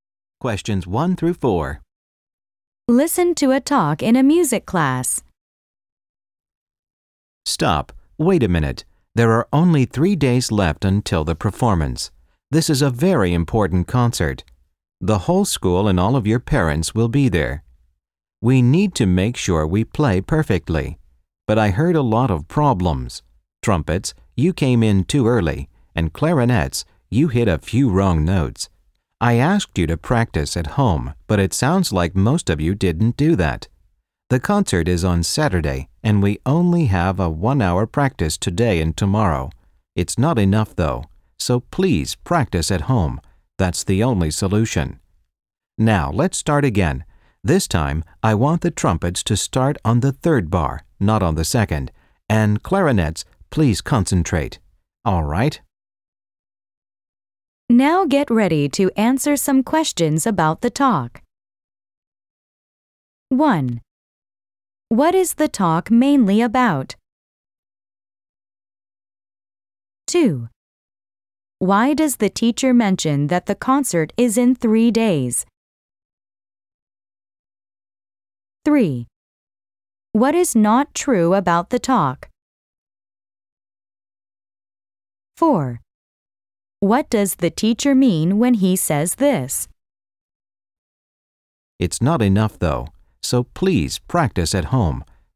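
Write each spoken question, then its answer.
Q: What is the talk mainly about?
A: The teacher tells the band they need more practice before the concert

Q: Why does the teacher mention that the concert is in 3 days?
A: To show there is very little time left, so they must improve quickly

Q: What does the teacher mean when he says this?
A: Class practice time is not enough, so students must practice at home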